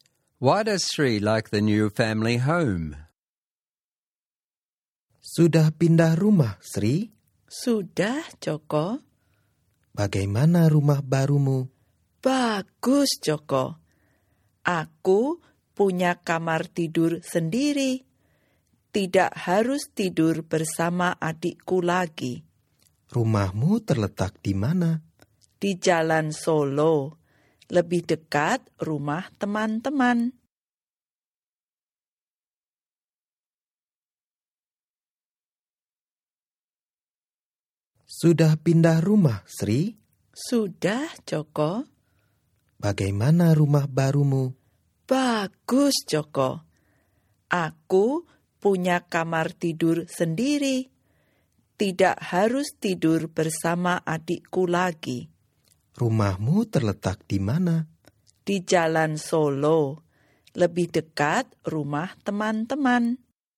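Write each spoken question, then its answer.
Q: Why does Sri like the new family home?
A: She has her own bedroom (no longer shares with her sibling) and it is closer to her friends' houses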